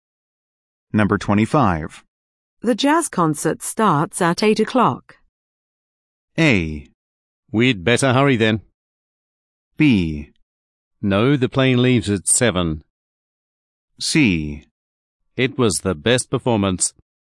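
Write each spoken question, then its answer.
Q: The jazz concert starts at 8 o'clock.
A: A: We'd better hurry then.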